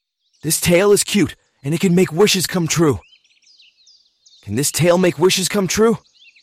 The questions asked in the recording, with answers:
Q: Can this tail make wishes come true?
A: Yes, it can. It can make wishes come true.